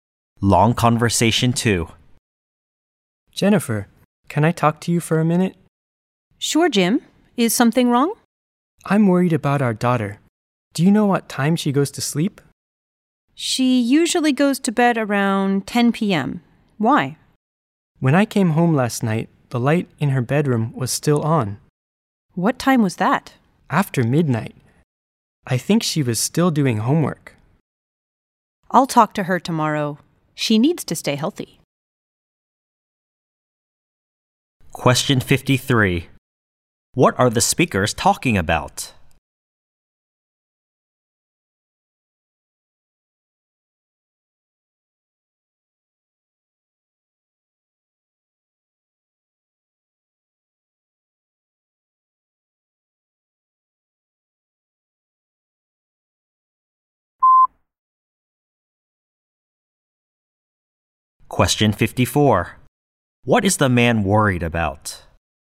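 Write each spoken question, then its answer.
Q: What are the speakers talking about?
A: Their daughter's sleeping time

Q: What is the man worried about?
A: Their daughter stays up too late, after midnight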